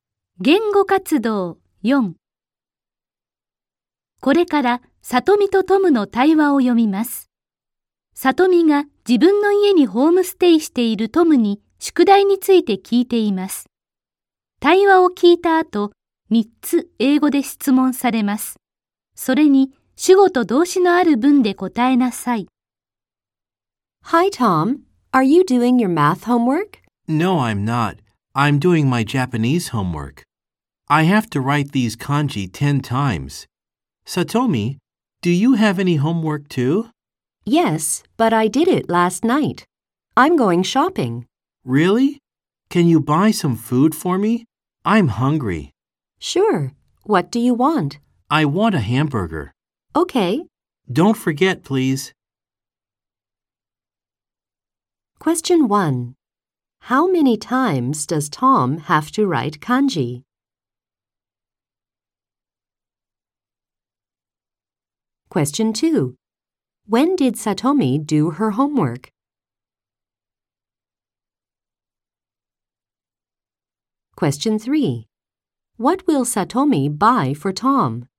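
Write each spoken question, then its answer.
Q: How many times does Tom have to write kanji?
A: He has to write them 10 times.

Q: When did Satomi do her homework?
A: She did it last night.

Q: What will Satomi buy for Tom?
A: She will buy a hamburger.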